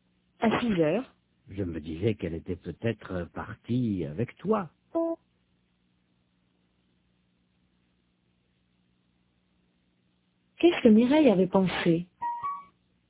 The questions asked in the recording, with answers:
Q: Qu'est-ce que Mireille avait pensé?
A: Qu'elle était peut-être partie avec Robert.